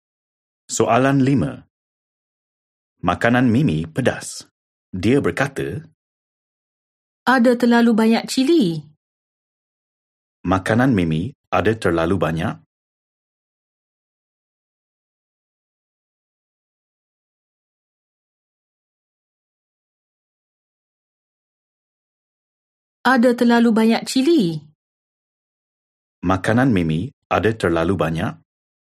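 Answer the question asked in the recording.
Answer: cili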